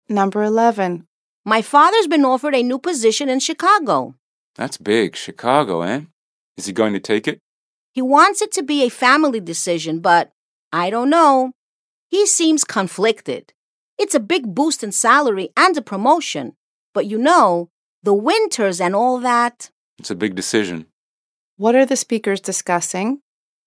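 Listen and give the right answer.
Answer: Whether the father should accept a new job offer in Chicago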